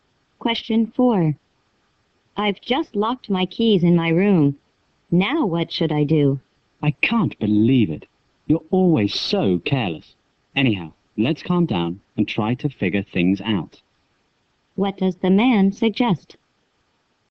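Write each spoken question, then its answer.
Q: What does the man suggest?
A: Calm down and try to figure out what to do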